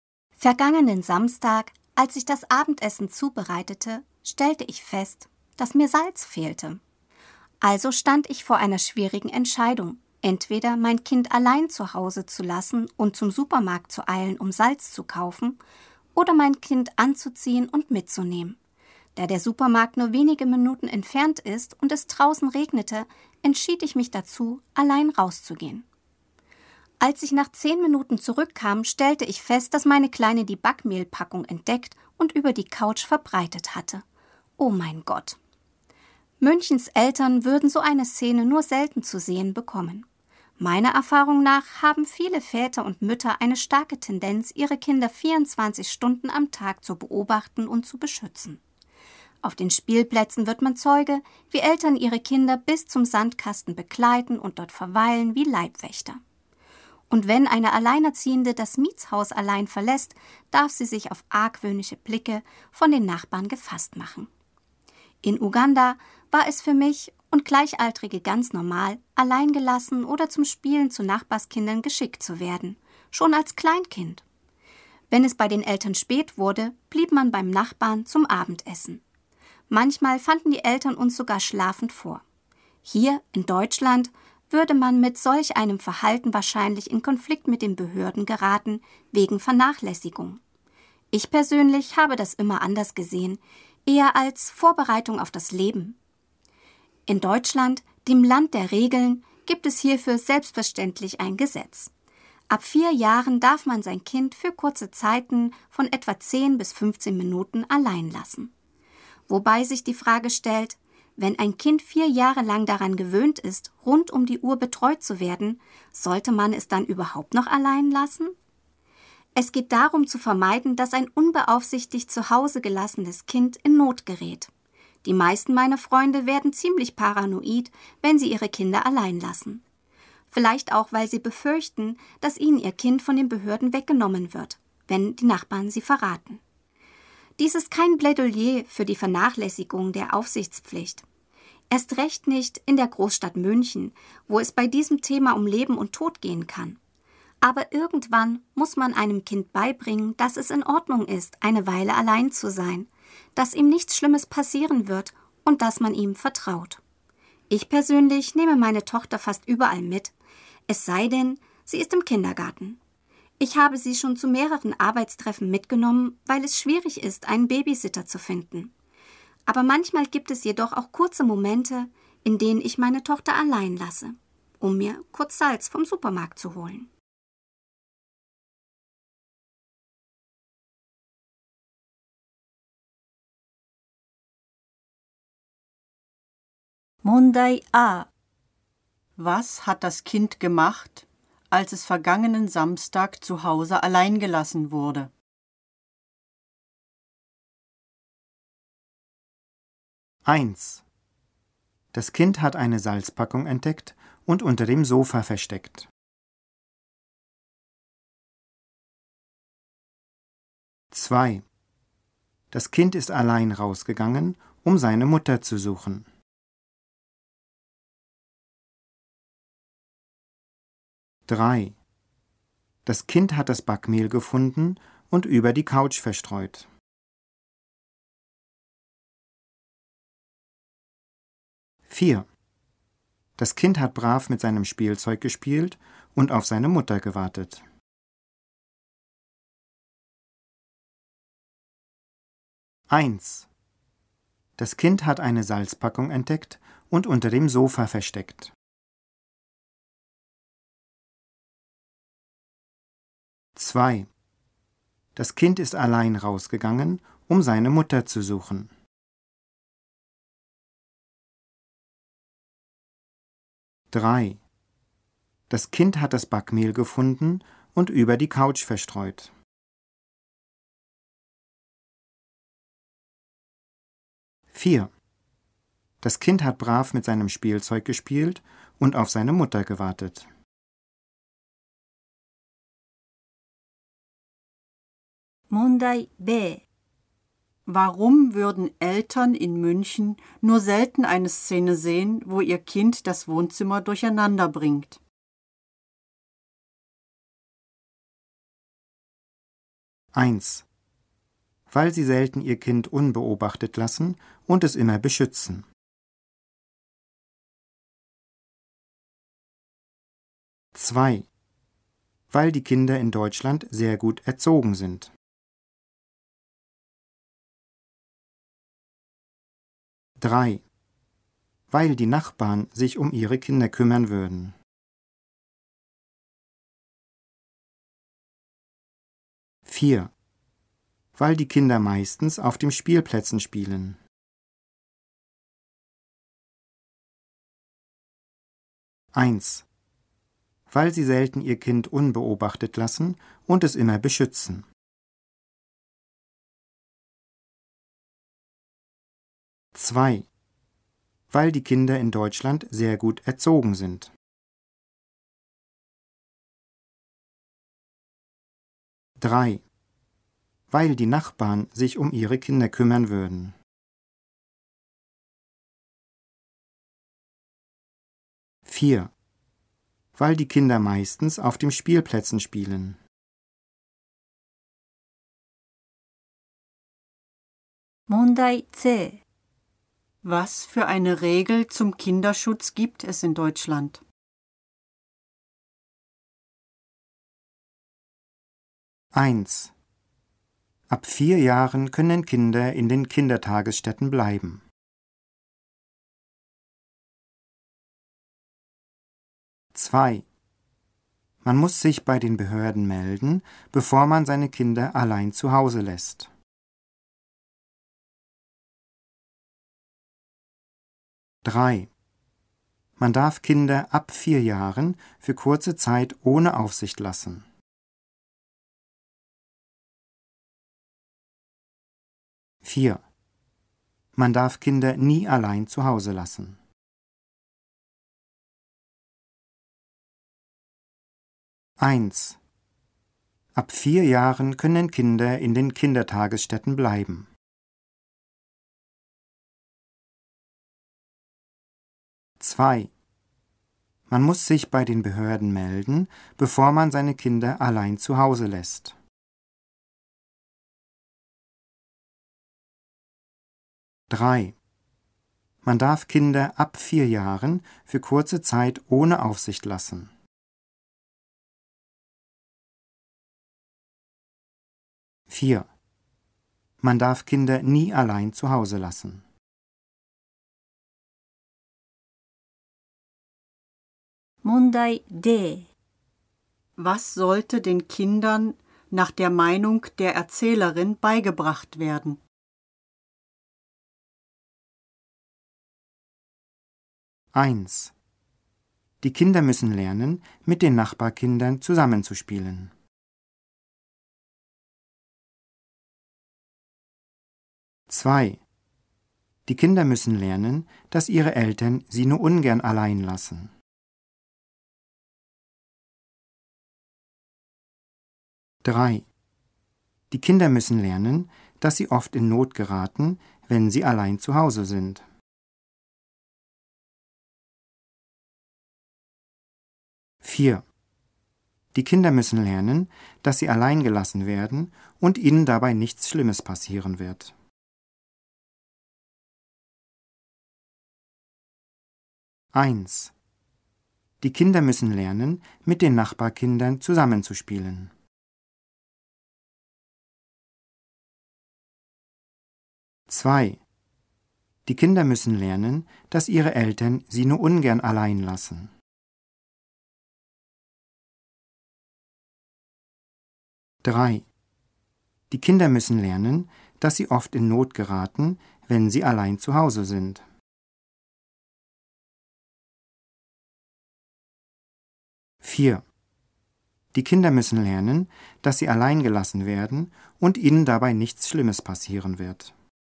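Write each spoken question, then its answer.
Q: Was hat das Kind gemacht, als es vergangenen Samstag zu Hause allein gelassen wurde?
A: 3: Das Kind hat das Backmehl gefunden und über die Couch verstreut.

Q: Warum würden Eltern in München nur selten eine Szene sehen, wo ihr Kind das Wohnzimmer durcheinander bringt?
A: 1: Weil sie selten ihr Kind unbeobachtet lassen und es immer beschützen.

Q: Was für eine Regel zum Kinderschutz gibt es in Deutschland?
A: 3: Man darf Kinder ab 4 Jahren für kurze Zeit ohne Aufsicht lassen.

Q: Was sollte den Kindern nach der Meinung der Erzählerin beigebracht werden?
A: 4: Die Kinder müssen lernen, dass sie allein gelassen werden und ihnen dabei nichts Schlimmes passieren wird.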